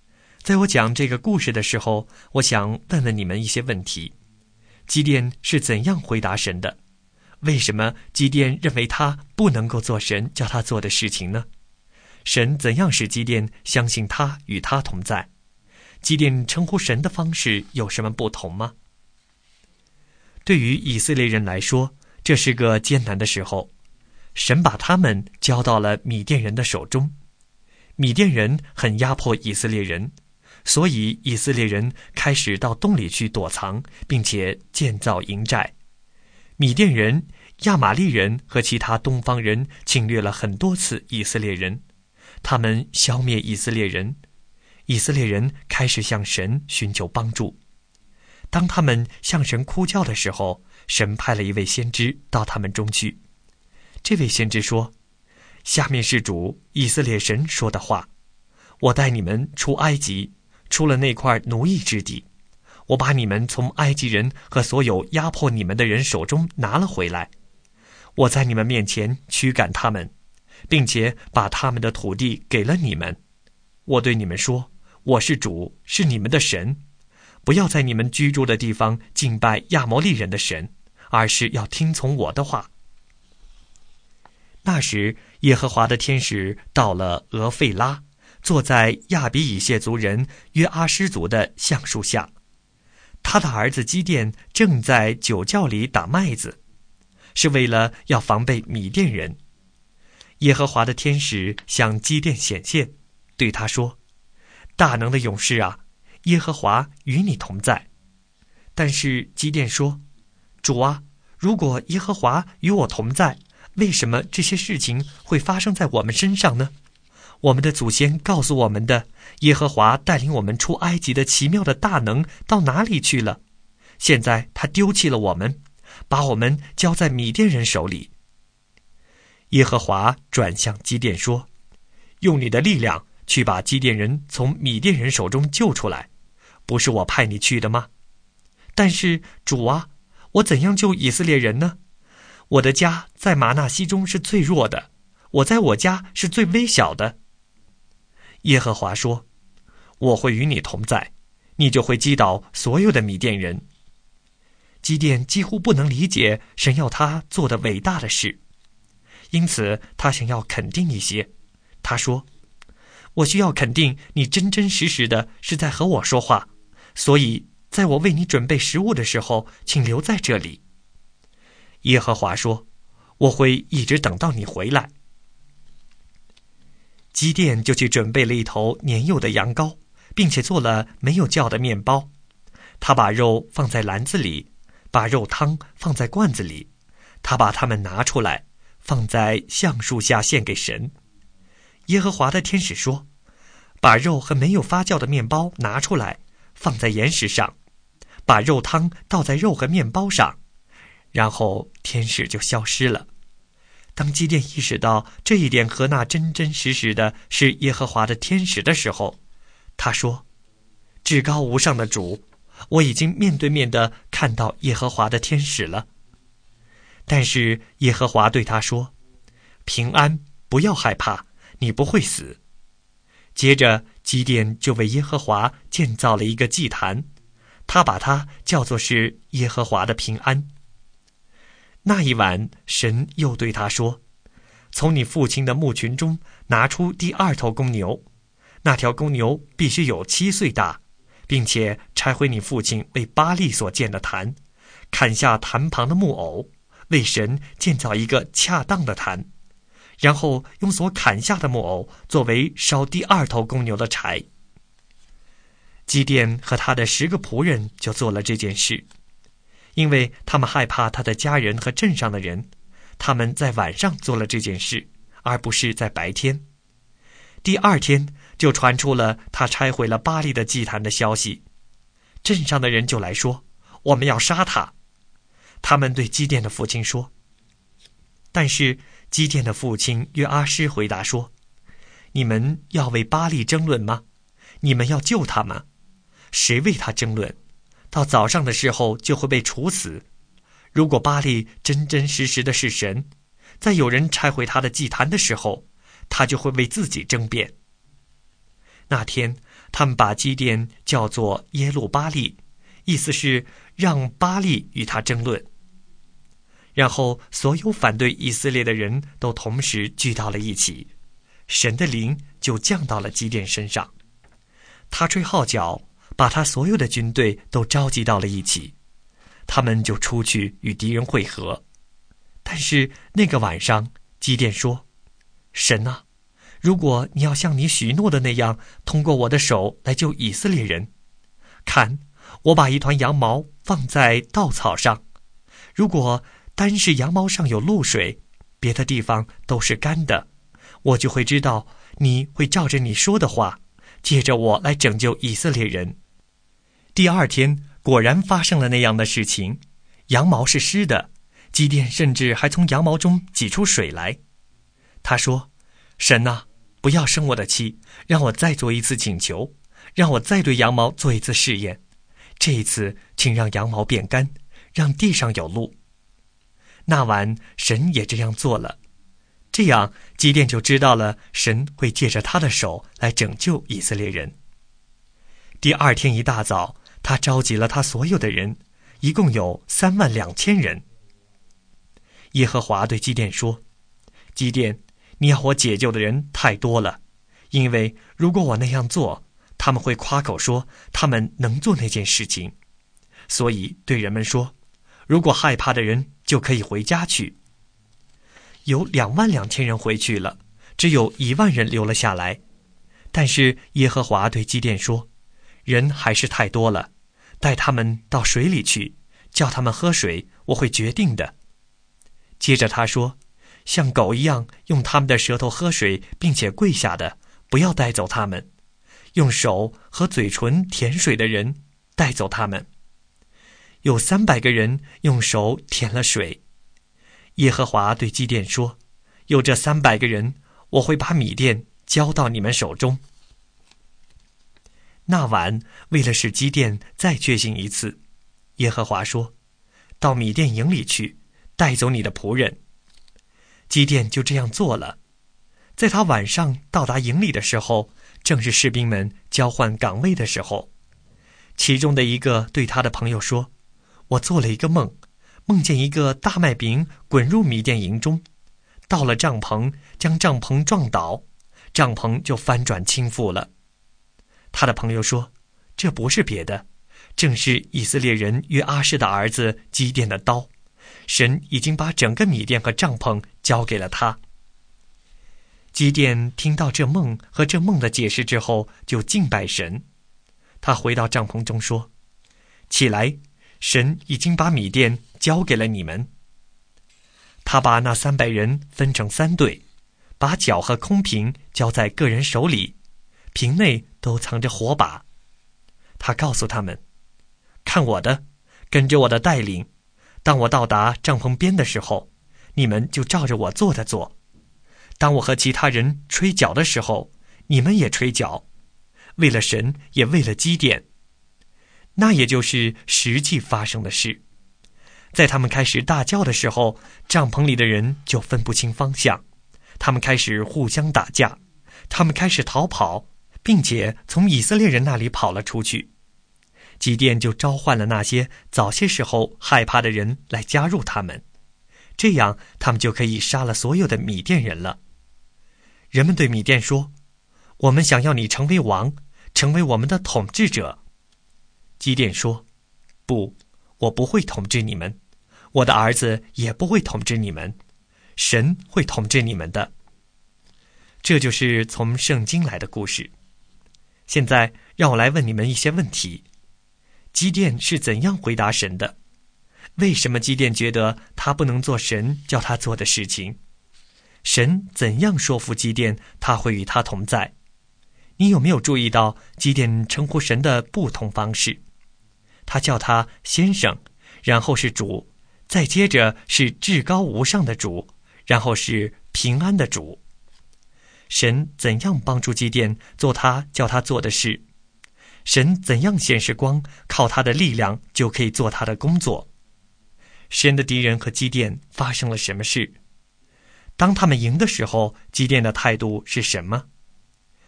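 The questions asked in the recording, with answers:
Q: 为什么基甸觉得他不能做神叫他做的事情?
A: 因为他的家在玛拿西中最弱,他在家中最微小

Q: 神的敌人和基甸发生了什么事?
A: 米甸人乱了方向,自相残杀并逃跑,被以色列人击败

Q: 当他们赢的时候,基甸的态度是什么?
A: 他拒绝做王,说神会统治他们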